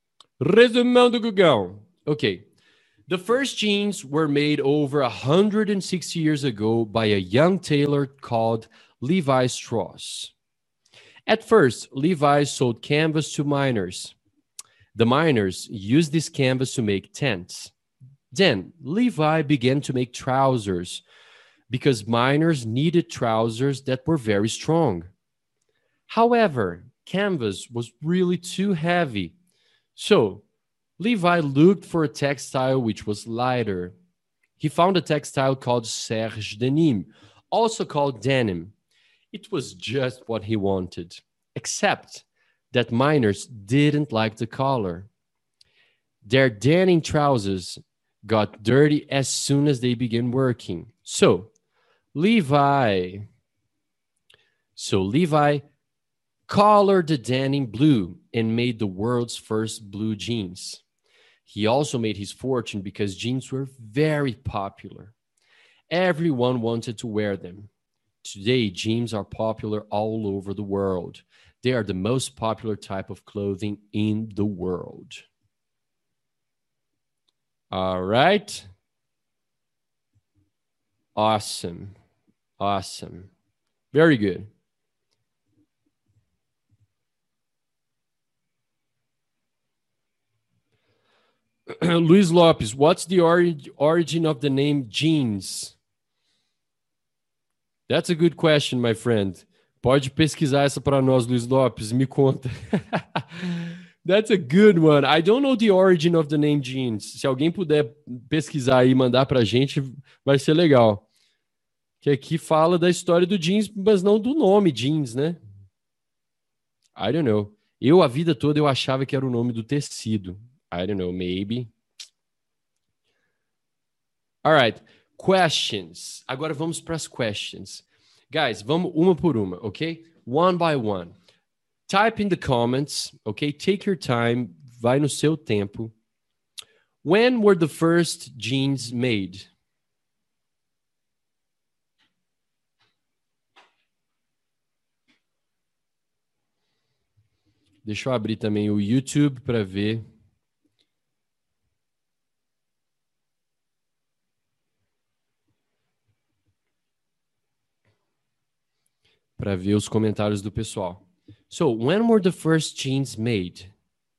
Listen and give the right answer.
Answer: Over 160 years ago.